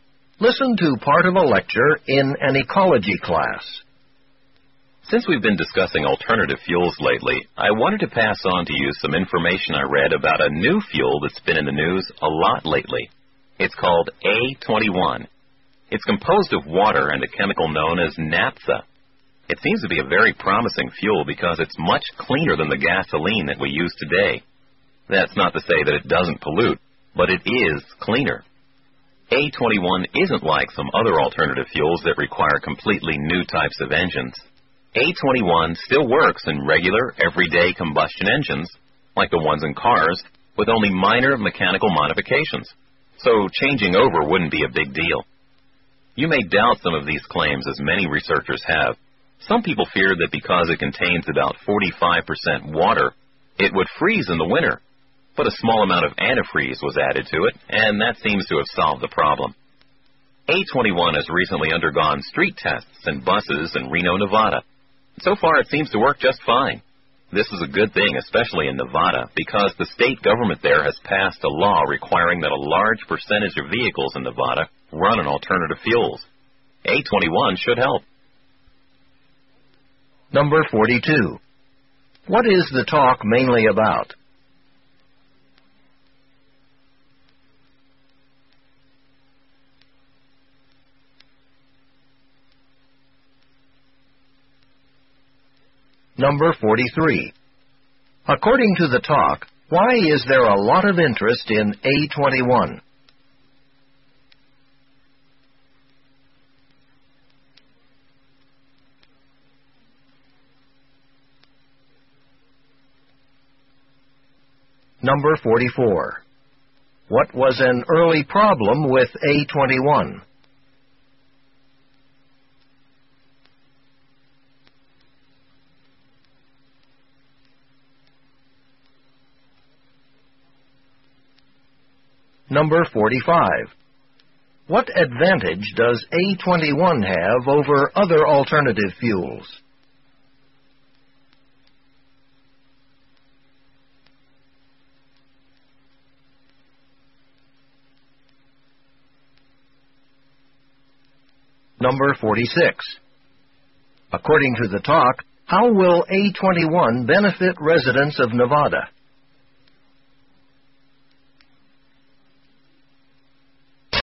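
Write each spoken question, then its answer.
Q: What is the talk mainly about?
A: A new alternative fuel, A21

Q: According to the talk, why is there a lot of interest in A21?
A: It is much cleaner than gasoline

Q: What was an early problem with A21?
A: People feared its water content would freeze in winter

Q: What advantage does A21 have over other alternative fuels?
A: It works in regular combustion engines with only minor modifications

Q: According to the talk, how will A21 benefit residents of Nevada?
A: It will help meet the state law requiring many vehicles to run on alternative fuels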